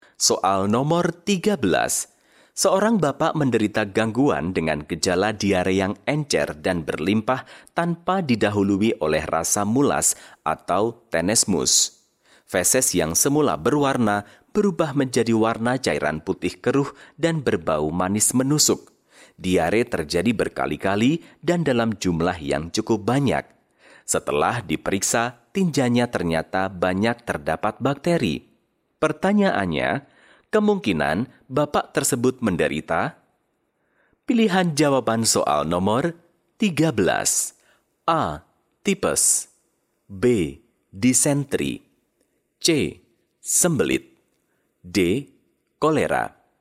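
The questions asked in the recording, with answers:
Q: Pertanyaannya, kemungkinan bapak tersebut menderita?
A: D: Kolera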